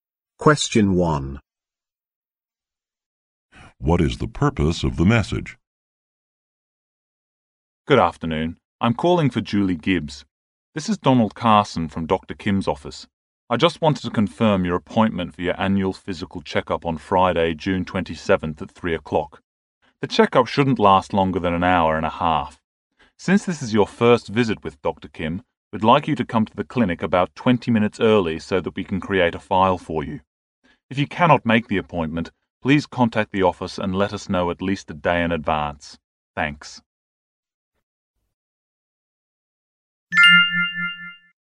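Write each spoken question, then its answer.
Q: What is the purpose of the message?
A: To confirm a checkup appointment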